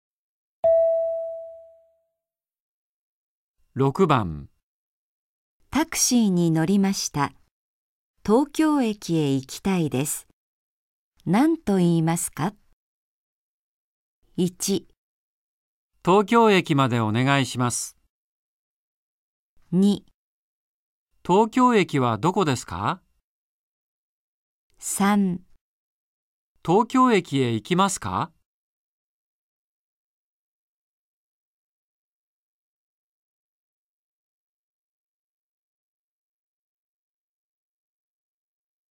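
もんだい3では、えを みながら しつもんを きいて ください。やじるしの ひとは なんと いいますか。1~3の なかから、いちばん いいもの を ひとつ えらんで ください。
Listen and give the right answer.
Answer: 東京駅までお願いします。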